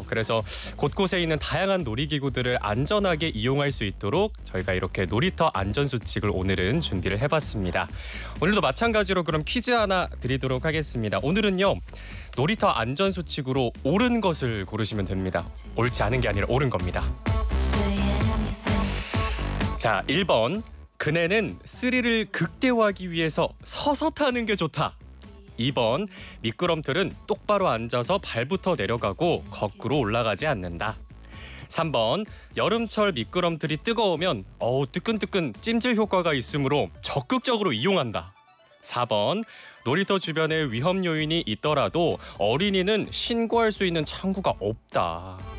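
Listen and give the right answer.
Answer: 2번: 미끄럼틀은 똑바로 앉아서 발부터 내려가고 거꾸로 올라가지 않는다.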